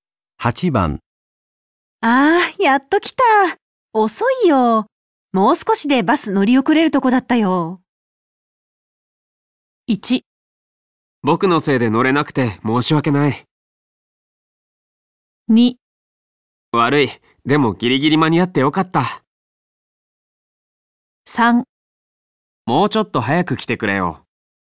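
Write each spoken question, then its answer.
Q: ああ、やっと来た。遅いよ。もう少しでバス乗り遅れるとこだったよ。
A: 2: 悪い。でもギリギリ間に合ってよかった。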